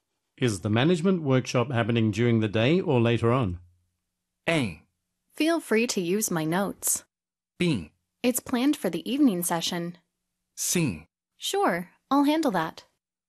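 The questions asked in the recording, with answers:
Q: Is the management workshop happening during the day or later on?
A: B: It's planned for the evening session.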